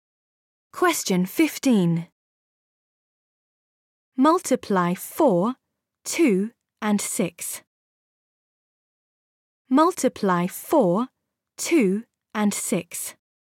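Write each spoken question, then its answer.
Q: Multiply 4, 2 and 6.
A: 48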